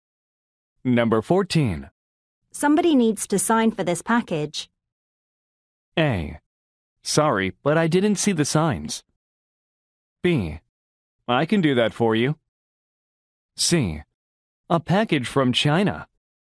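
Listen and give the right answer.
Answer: B: I can do that for you.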